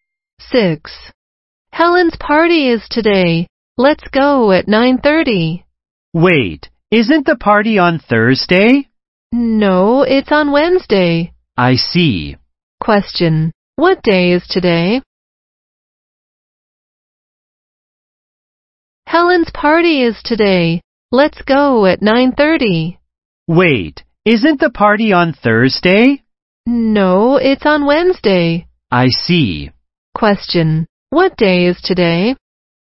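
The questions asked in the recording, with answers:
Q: what day is today?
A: Wednesday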